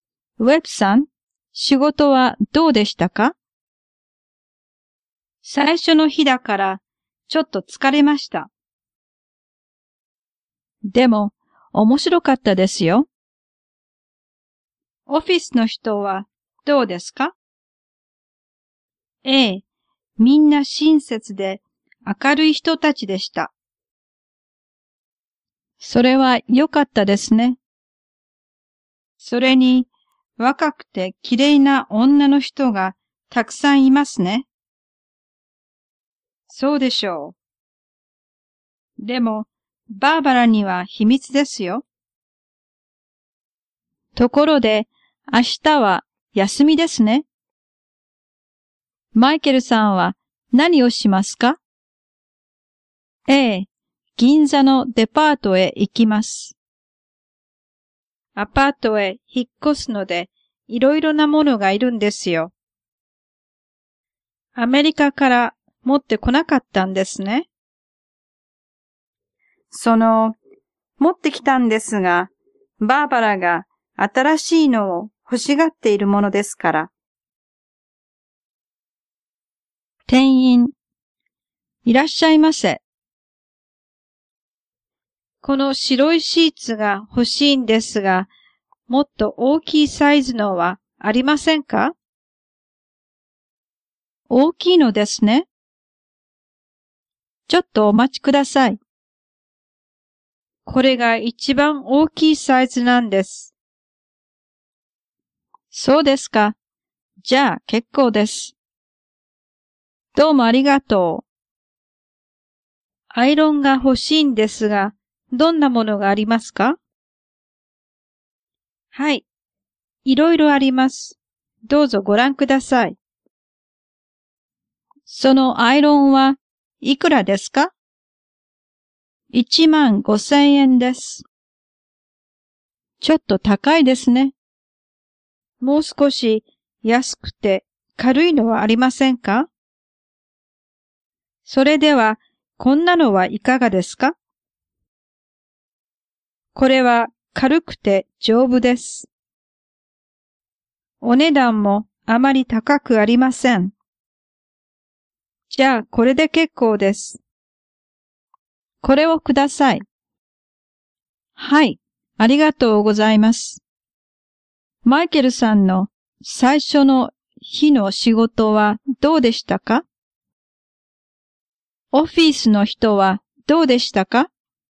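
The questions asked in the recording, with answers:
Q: マイケルさんの最初の日の仕事はどうでしたか?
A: ちょっと疲れましたが、面白かったです。

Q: オフィスの人はどうでしたか?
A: みんな親切で明るい人たちでした。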